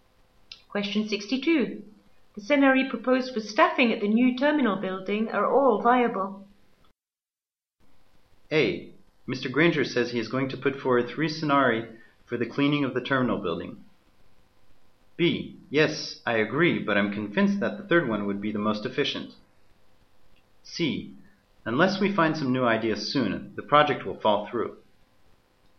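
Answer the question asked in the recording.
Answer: B: Yes, I agree, but I'm convinced that the third one would be the most efficient.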